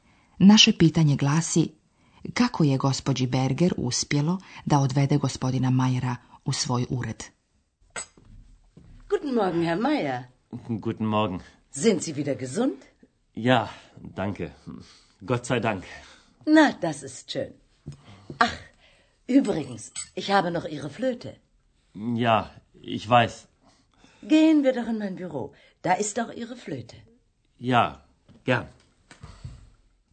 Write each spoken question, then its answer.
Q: Naše pitanje glasi, kako je gospođi Berger uspjelo da odvede gospodina Mayera u svoj ured?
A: Vi ste sigurno razumjeli da je flauta gospodina Mayera kod gospođe Berger i da ju je ona ostavila u svom uredu, na sigurnom.